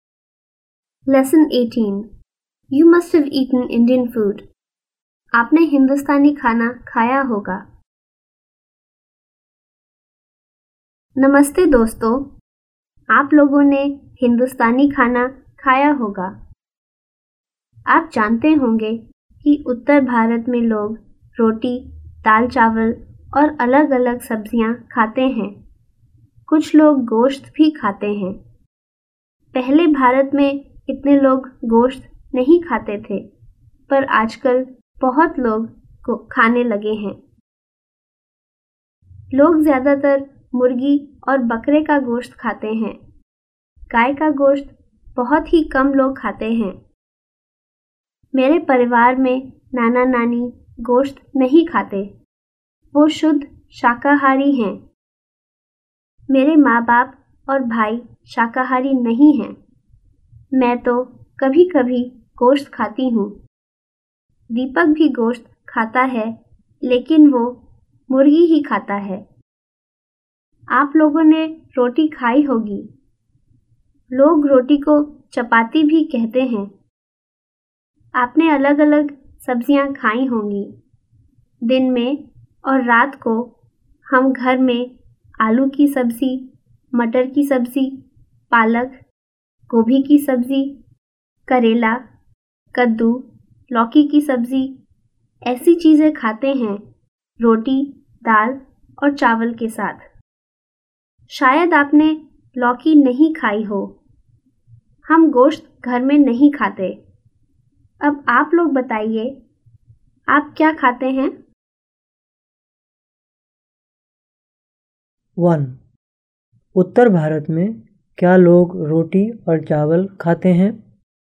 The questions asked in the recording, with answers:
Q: उत्तर भारत में क्या लोग रोटी और चावल खाते हैं?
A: जी हाँ, उत्तर भारत में लोग रोटी और चावल खाते हैं.